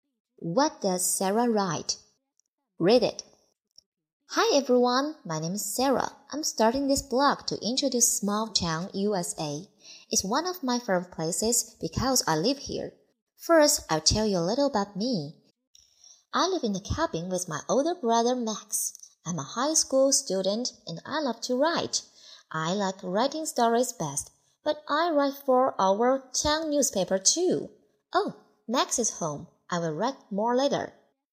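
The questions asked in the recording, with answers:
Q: What does Sarah write?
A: Stories, and articles for the town newspaper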